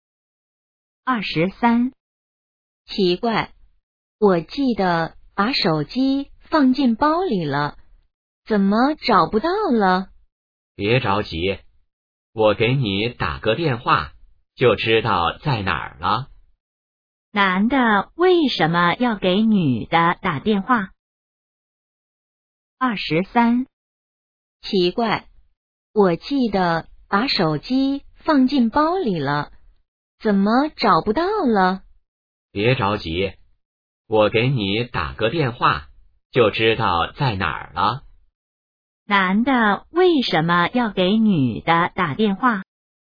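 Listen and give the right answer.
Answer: 帮她找手机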